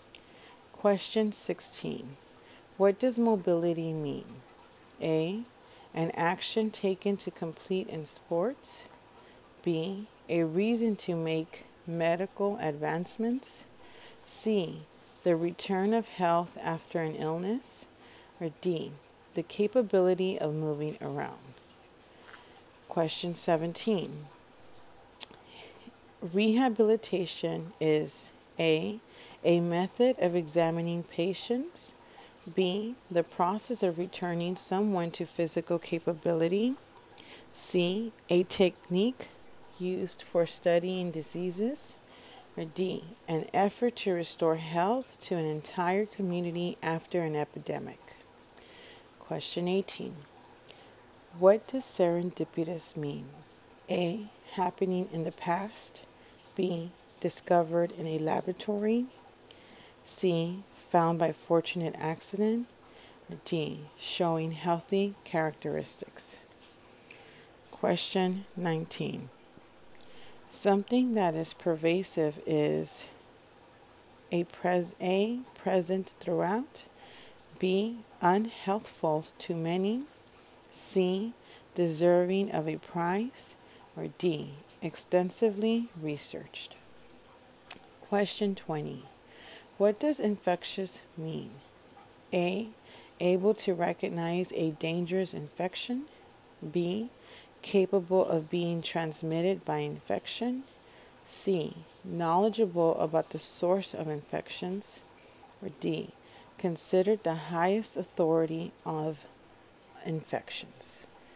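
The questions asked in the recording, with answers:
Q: What does mobility mean?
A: D: the capability of moving around

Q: Rehabilitation is A, method of examining patients, B, the process of returning someone to physical capability, C, a technique used for studying diseases, or D, an effort to restore health to an entire community after an epidemic.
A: B: the process of returning someone to physical capability

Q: What does serendipitous mean?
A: C: found by fortunate accident

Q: Something that is pervasive is A, present throughout, B, unhealthful to many, C, deserving of a prize, or D, extensively researched.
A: A: present throughout

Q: What does infectious mean?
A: B: capable of being transmitted by infection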